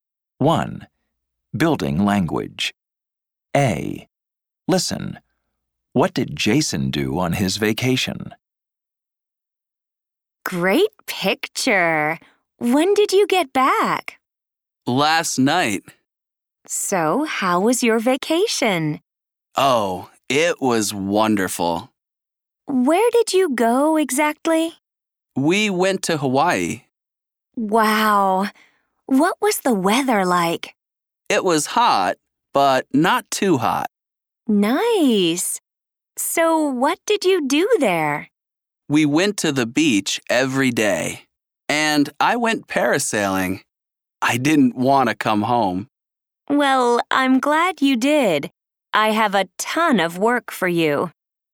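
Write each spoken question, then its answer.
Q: What did Jason do on his vacation?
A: He went to Hawaii, went to the beach every day, and went parasailing.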